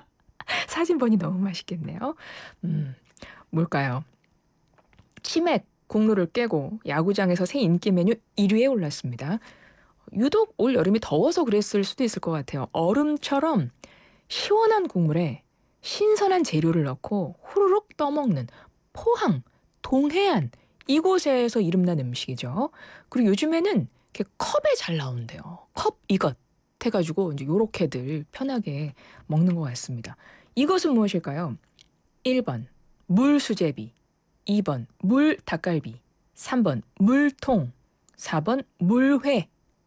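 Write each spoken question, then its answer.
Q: 이것은 무엇일까요? 1번 물수제비, 2번 물 닭갈비, 3번 물통, 4번 물회.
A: 4: 물회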